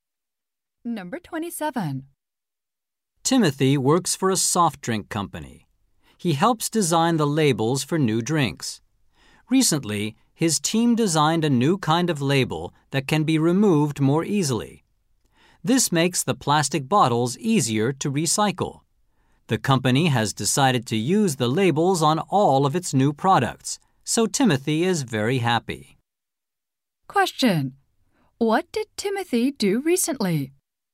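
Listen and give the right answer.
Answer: Helped design a label that is easier to remove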